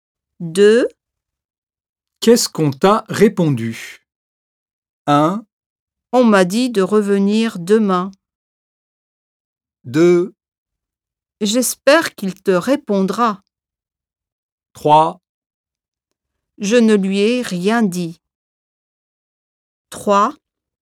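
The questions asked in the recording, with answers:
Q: Qu'est-ce qu'on t'a répondu?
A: 1: On m'a dit de revenir demain.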